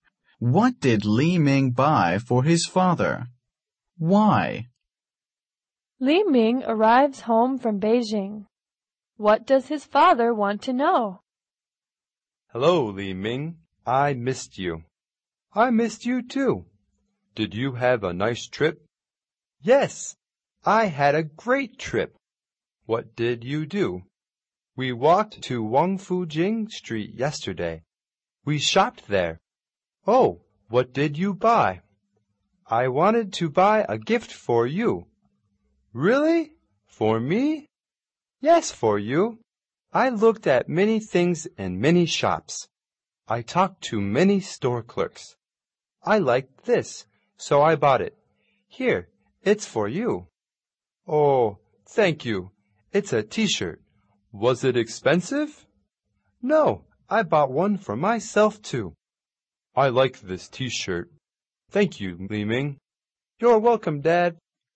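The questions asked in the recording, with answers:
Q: What did Li Ming buy for his father?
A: A T-shirt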